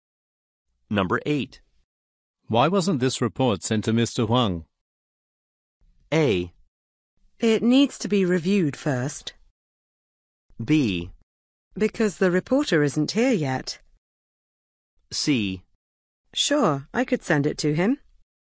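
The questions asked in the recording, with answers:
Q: Why wasn't this report sent to Mr. Huang?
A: A: It needs to be reviewed first.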